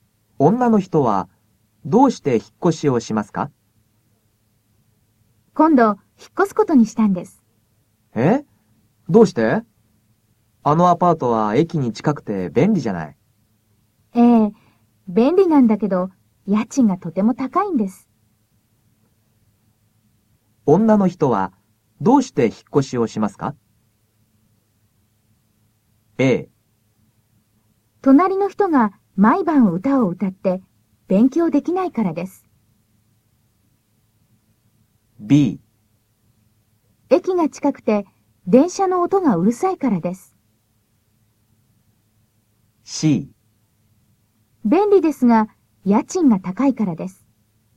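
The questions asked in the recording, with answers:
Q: 女の人はどうして引っ越しをしますか?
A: C: 便利ですが、家賃が高いからです。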